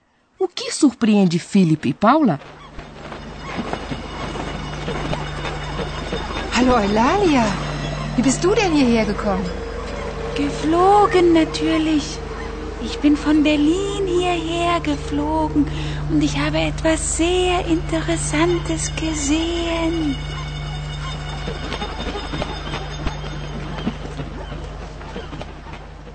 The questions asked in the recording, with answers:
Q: O que surpreende Philip e Paula?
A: É Oilália, a coruja que fala.